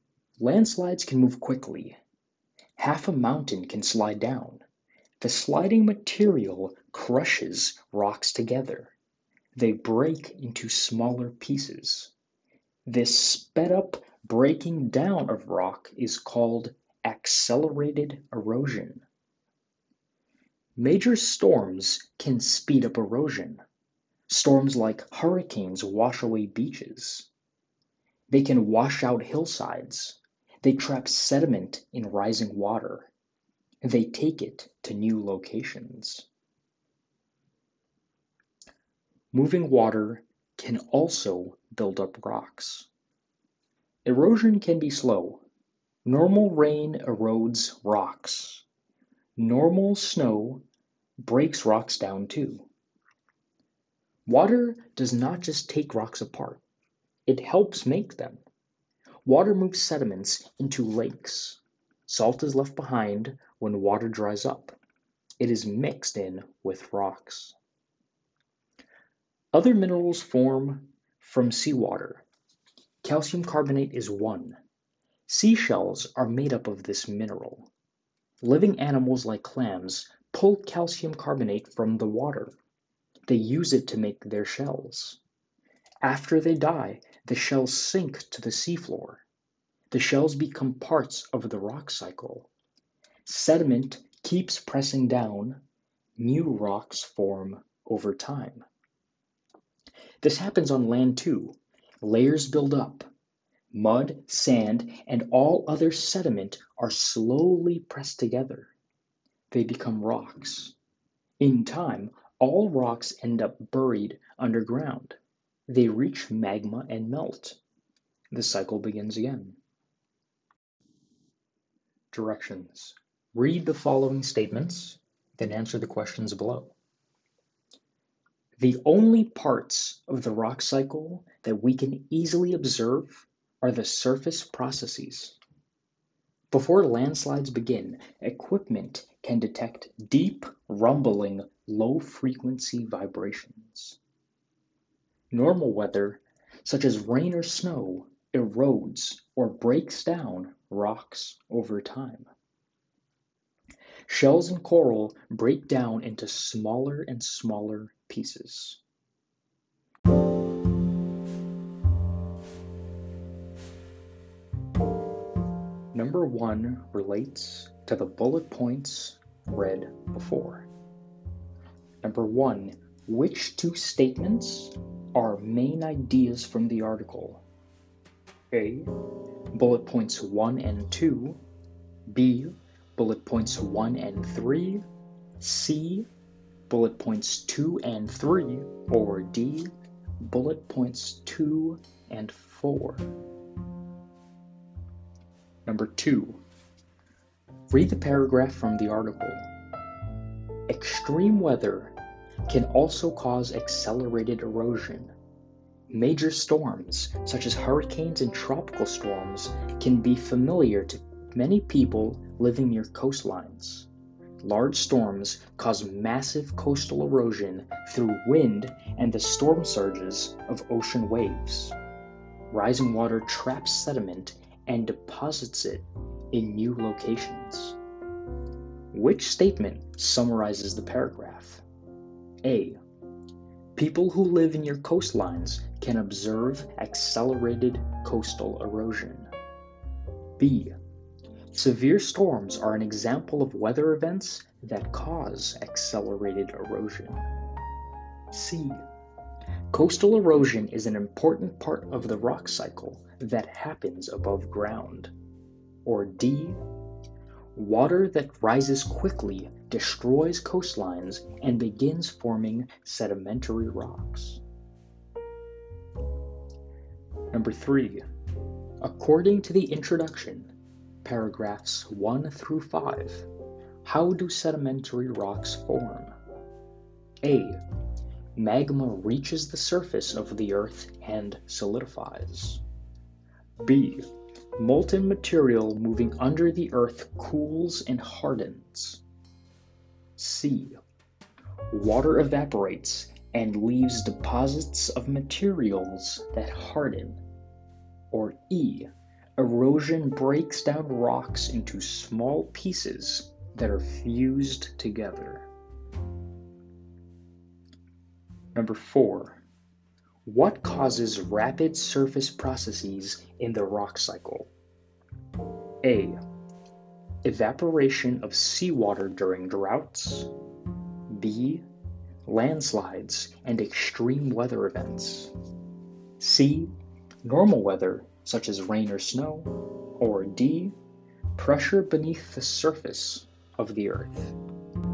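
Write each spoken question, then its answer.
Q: Which statement summarizes the paragraph?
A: B: Severe storms are an example of weather events that cause accelerated erosion.

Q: Number four. What causes rapid surface processes in the rock cycle?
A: B: Landslides and extreme weather events.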